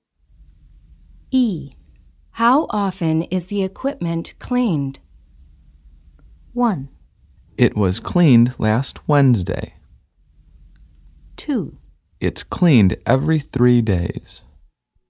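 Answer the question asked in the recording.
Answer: 2: It's cleaned every 3 days.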